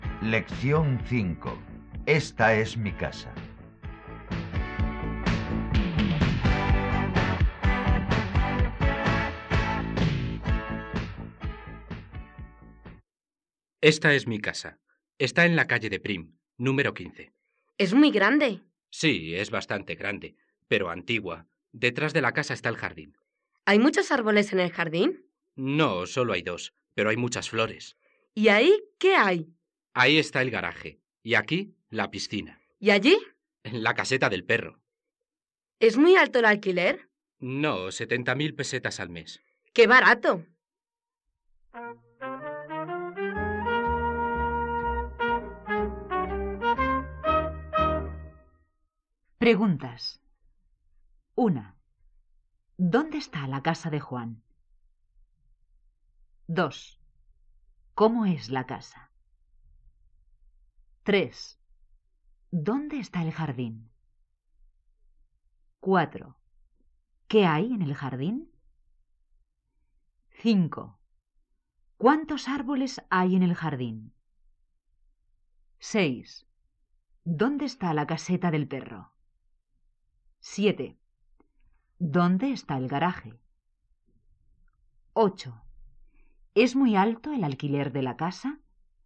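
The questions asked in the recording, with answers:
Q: ¿Dónde está la casa de Juan?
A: En la calle de Prim, número 15

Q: ¿Cómo es la casa?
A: Bastante grande, pero antigua

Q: ¿Dónde está el jardín?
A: Detrás de la casa

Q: ¿Qué hay en el jardín?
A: Dos árboles y muchas flores

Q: ¿Cuántos árboles hay en el jardín?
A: Solo dos

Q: ¿Es muy alto el alquiler de la casa?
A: No, 70.000 pesetas al mes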